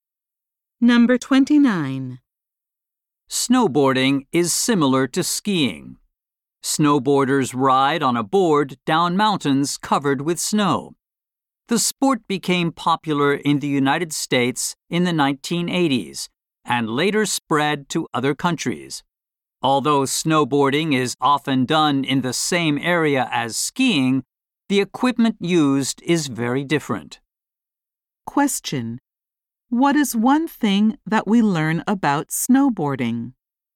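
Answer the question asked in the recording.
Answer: It became popular in the United States in the 1980s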